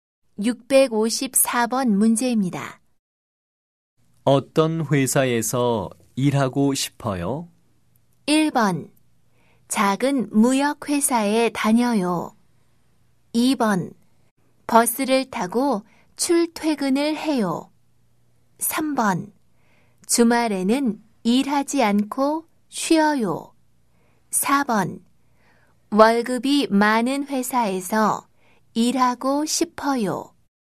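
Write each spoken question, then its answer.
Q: 어떤 회사에서 일하고 싶어요?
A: 4: 월급이 많은 회사에서 일하고 싶어요.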